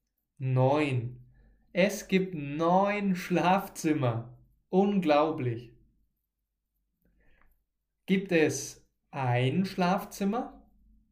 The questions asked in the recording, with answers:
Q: Gibt es ein Schlafzimmer?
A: Nein, es gibt nicht nur ein Schlafzimmer.